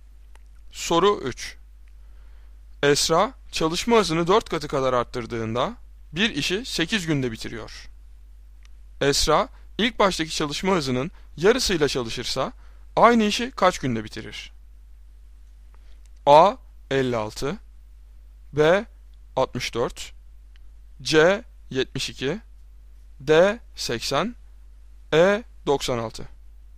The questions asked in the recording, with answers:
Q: Esra ilk baştaki çalışma hızının yarısıyla çalışırsa aynı işi kaç günde bitirir?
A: Doğru cevap D 80.